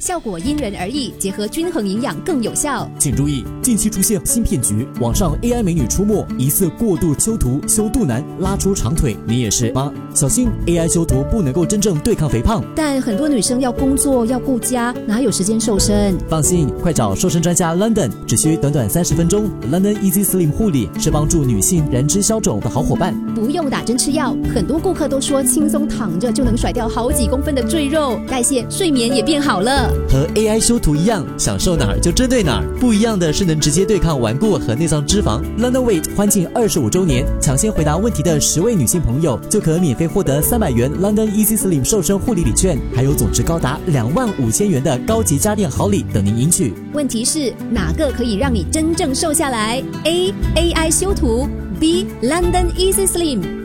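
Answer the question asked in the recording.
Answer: B: London Easy Slim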